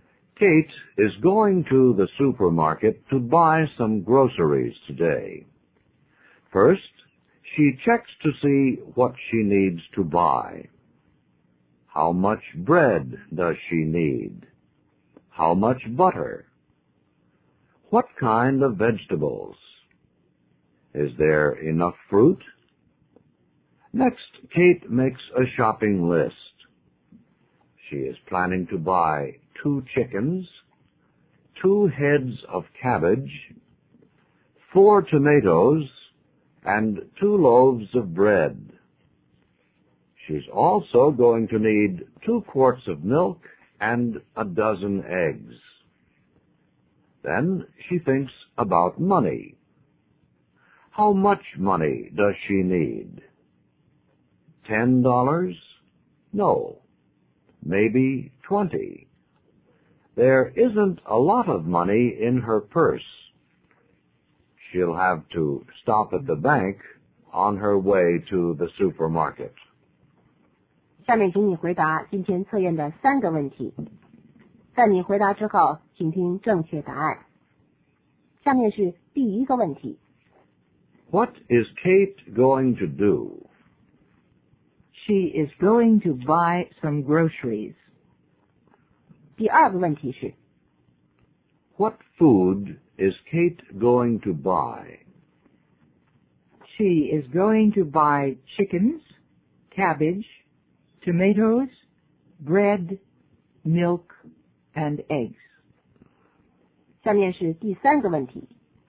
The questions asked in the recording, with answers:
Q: What is Kate going to do?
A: She is going to buy some groceries.

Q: What food is Kate going to buy?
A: She is going to buy chickens, cabbage, tomatoes, bread, milk, and eggs.